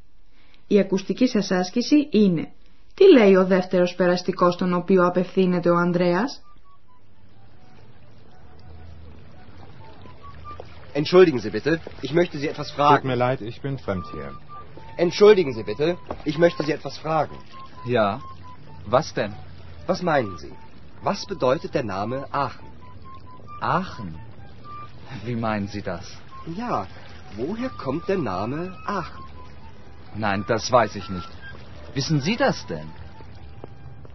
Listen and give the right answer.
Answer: Ο δεύτερος περαστικός που ρωτά ο Ανδρέας δεν ξέρει από πού προέρχεται το όνομα Aachen και ρωτά τον Ανδρέα αν το ξέρει και αυτός ο ίδιος.